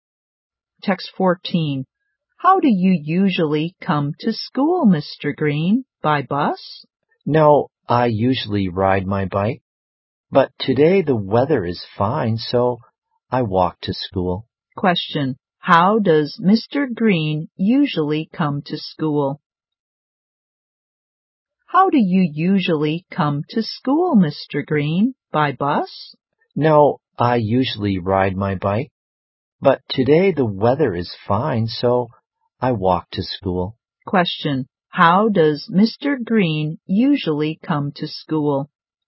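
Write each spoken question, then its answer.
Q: How does Mr. Green usually come to school?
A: By bike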